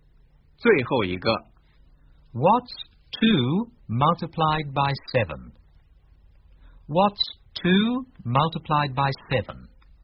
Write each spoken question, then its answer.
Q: What's 2 multiplied by 7?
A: 14.